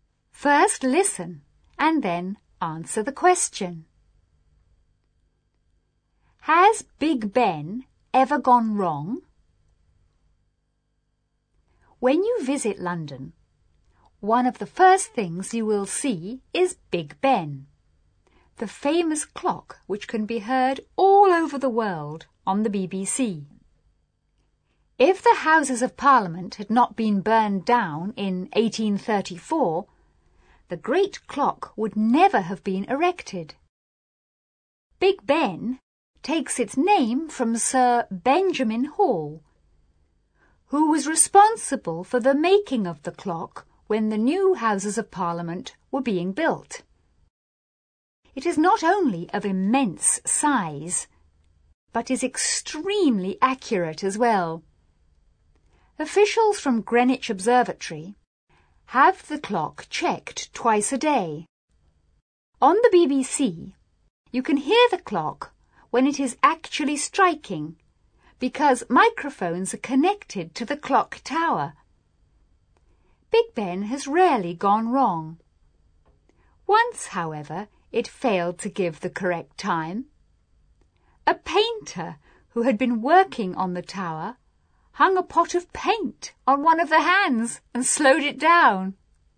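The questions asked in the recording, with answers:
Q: Has Big Ben ever gone wrong?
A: Yes, once, when a painter hung a pot of paint on one of the hands and slowed it down.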